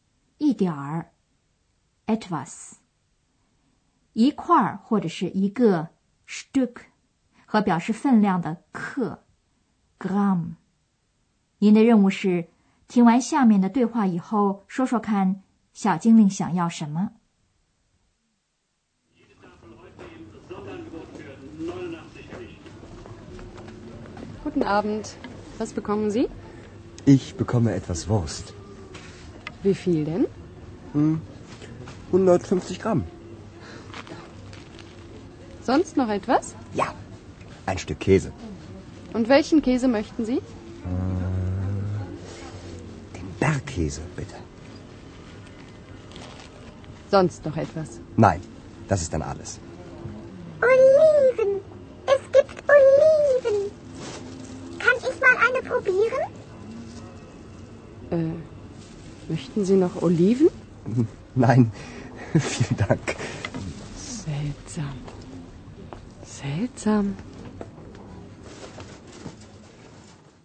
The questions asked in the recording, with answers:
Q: 您的任务是听完下面的对话以后说说看小精灵想要什 么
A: 小精灵发现女售货员这儿有橄榄,她真想尝一个。